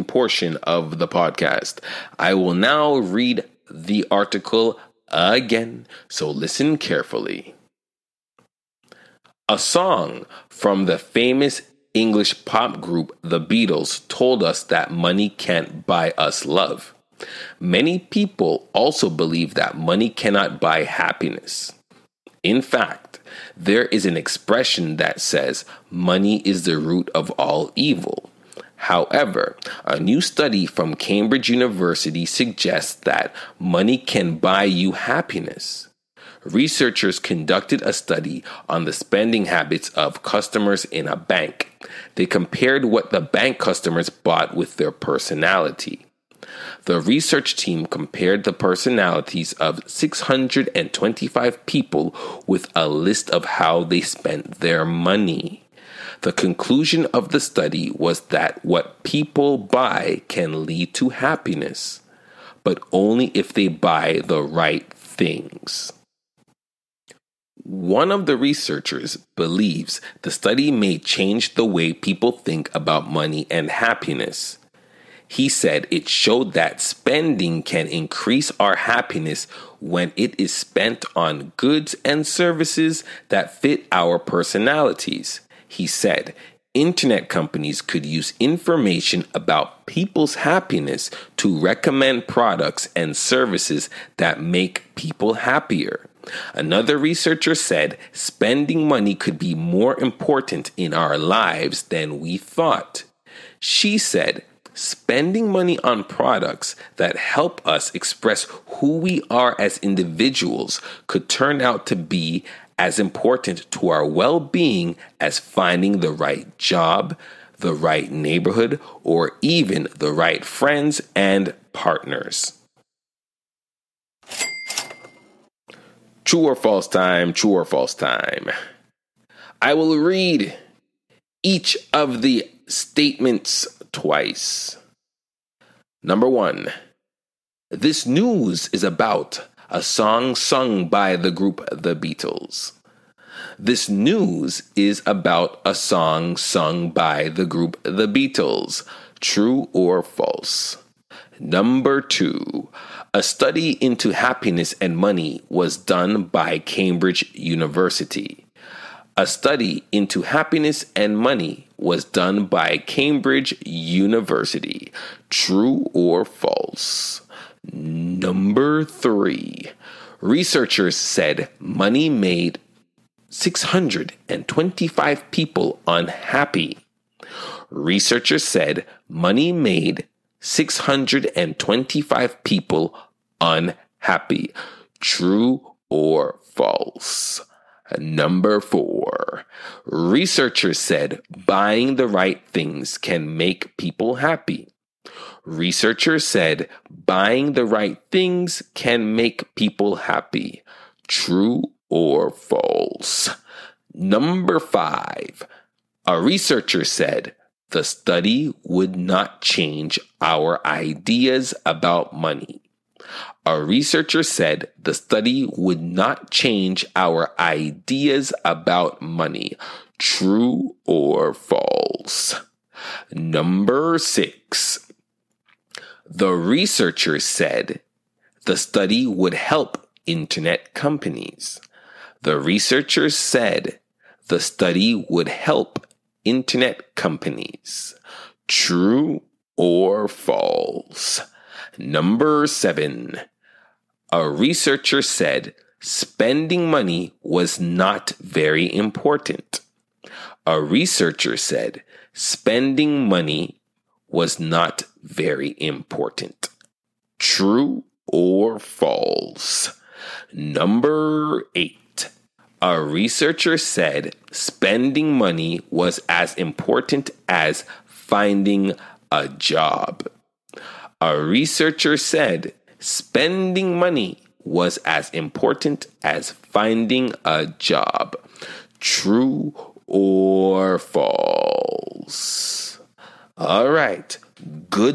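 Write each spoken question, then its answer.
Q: a study into happiness and money was done by Cambridge University.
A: True

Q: researchers said money made 625 people unhappy.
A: False

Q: researchers said buying the right things can make people happy.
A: True

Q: a researcher said the study would not change our ideas about money.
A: False

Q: A researcher said spending money was not very important.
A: False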